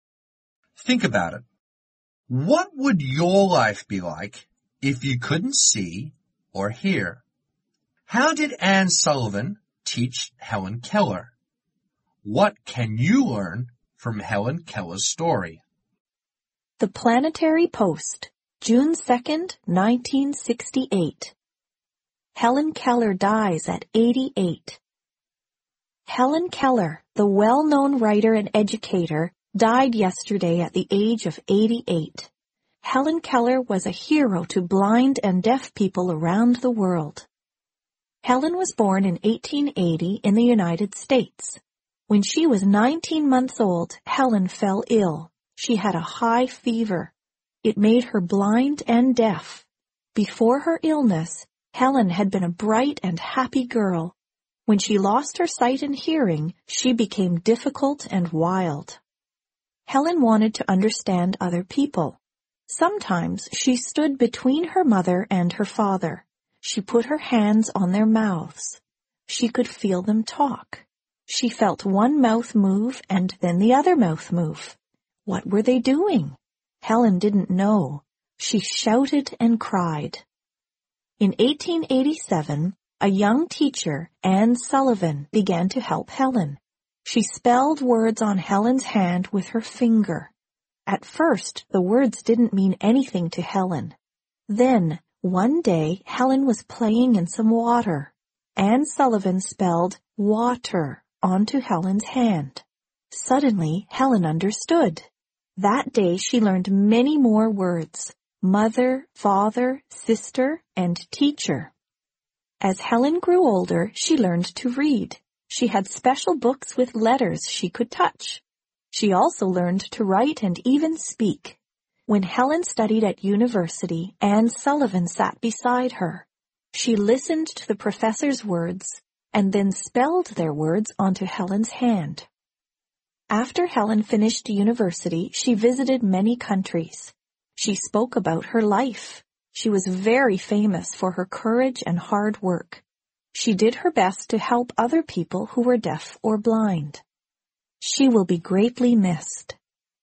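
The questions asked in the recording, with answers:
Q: How did Anne Sullivan teach Helen Keller?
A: She spelled words on Helen's hand with her finger.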